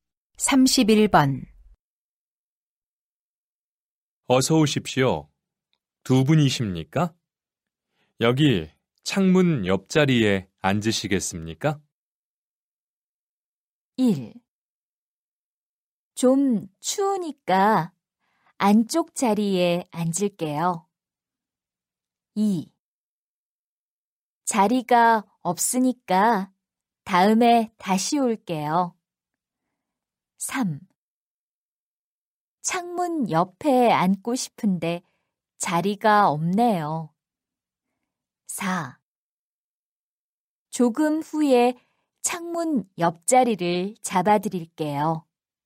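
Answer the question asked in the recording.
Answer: 1: 좀 추우니까 안쪽 자리에 앉을게요.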